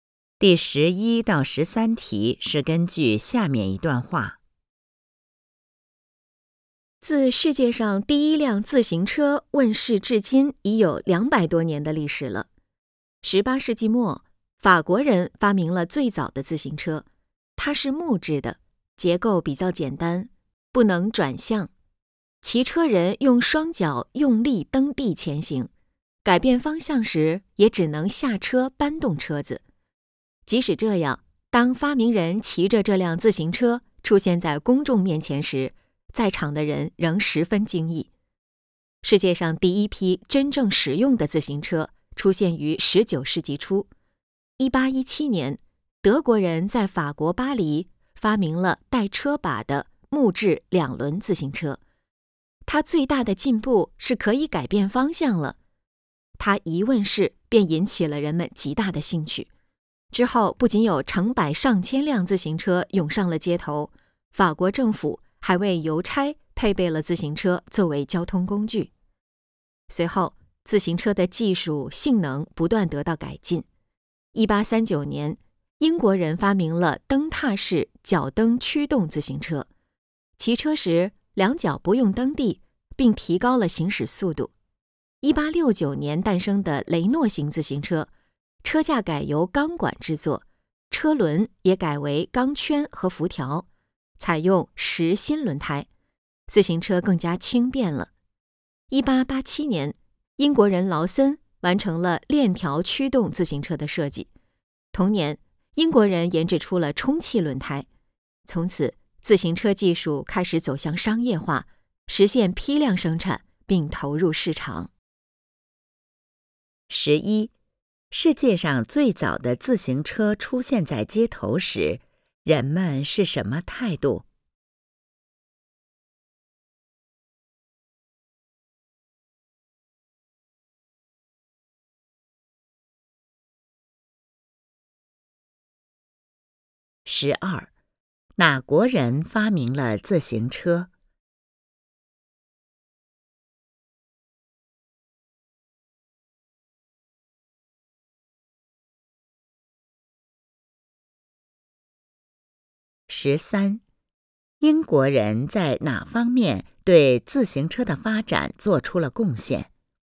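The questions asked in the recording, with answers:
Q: 世界上最早的自行车出现在街头时,人们是什么态度?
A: 十分惊异

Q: 哪国人发明了自行车?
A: 法国人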